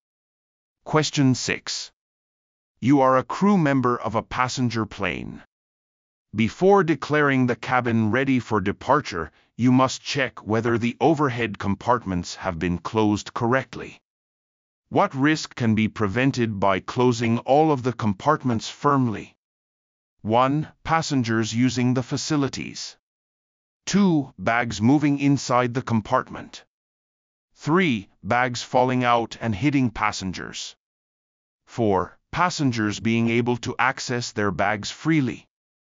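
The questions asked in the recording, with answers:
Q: What risk can be prevented by closing all of the compartments firmly?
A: 3: Bags falling out and hitting passengers.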